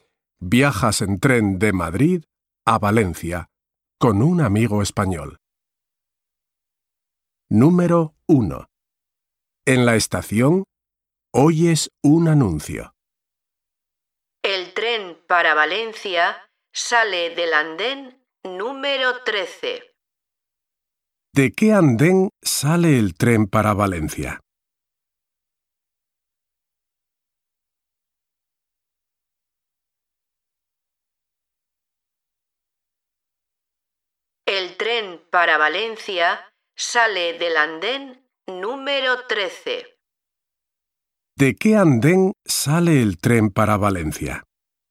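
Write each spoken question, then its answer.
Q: ¿De qué andén sale el tren para Valencia?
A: Del andén número 13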